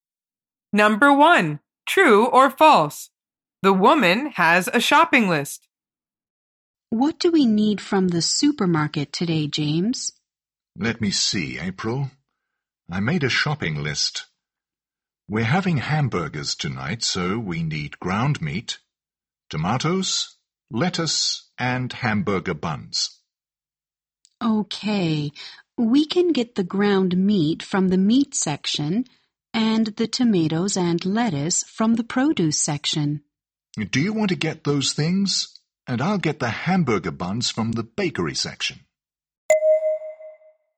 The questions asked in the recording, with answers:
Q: The woman has a shopping list.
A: The answer is false.